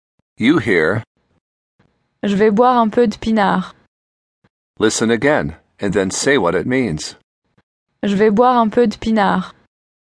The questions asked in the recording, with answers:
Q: Listen again, and then say what it means.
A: I'm going to drink a little wine.